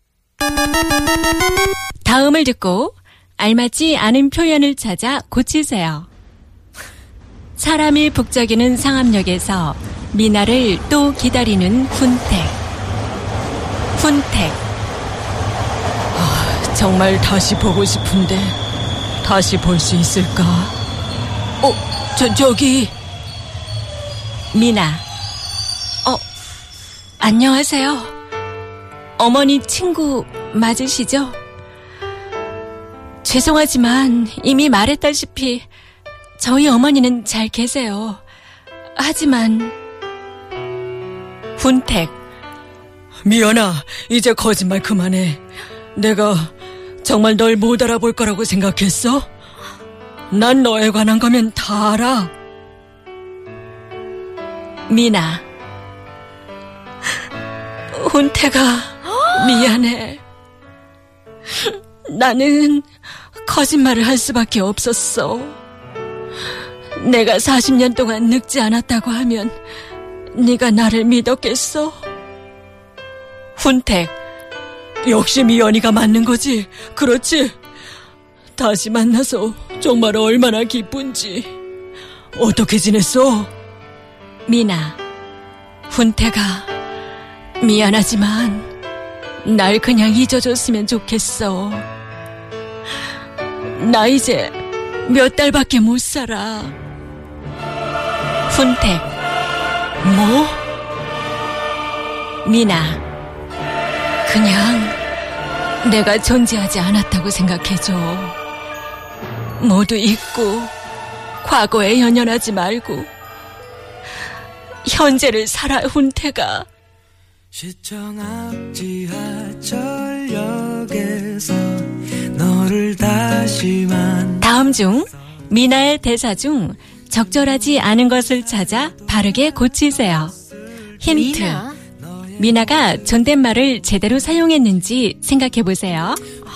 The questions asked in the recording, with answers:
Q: 다음 중 미나의 대사 중 적절하지 않은 것을 찾아 바르게 고치세요.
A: It was 말씀 드렸다시피 instead of 말했다시피.